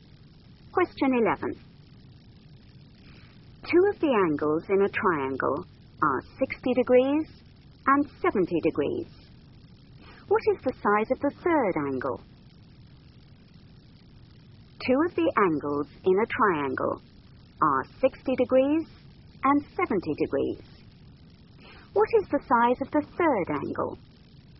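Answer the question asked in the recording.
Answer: 50 degrees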